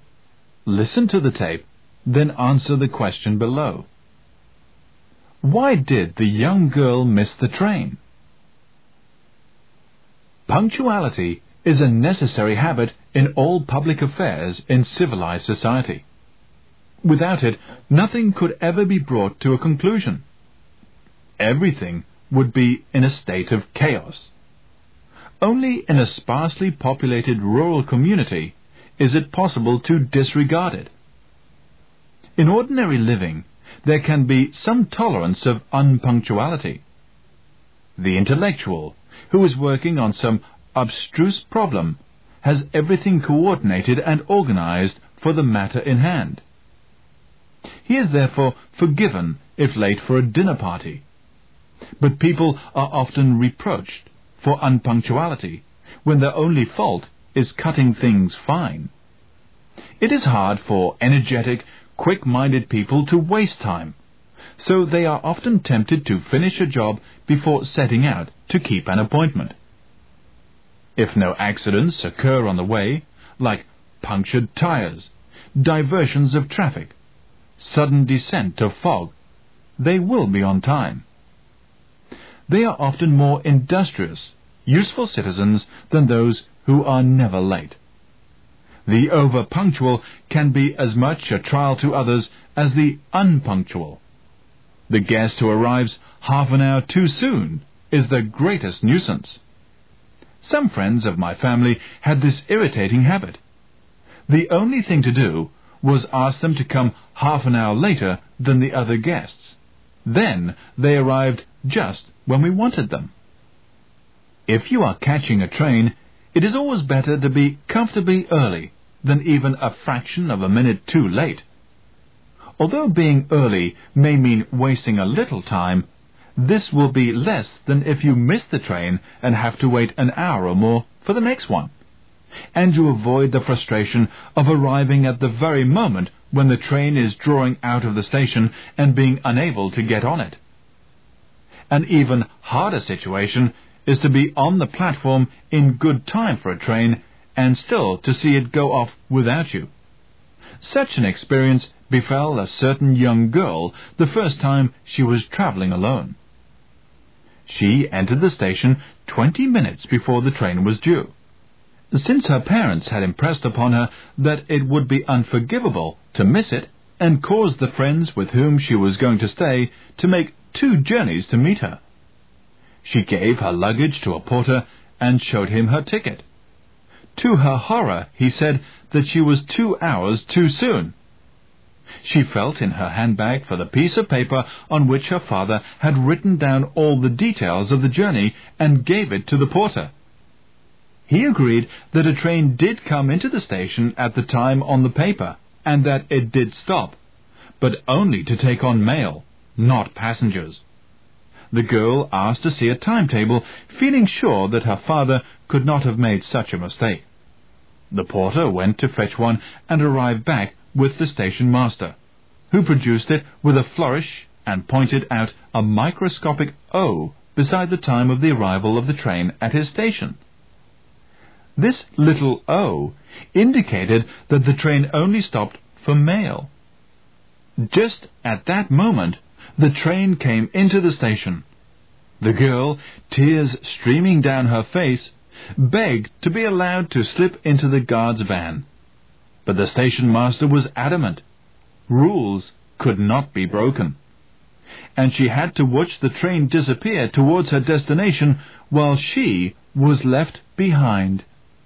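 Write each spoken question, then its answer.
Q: Why did the young girl miss the train?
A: The train only stopped there for mail, not passengers, so she wasn't allowed to board it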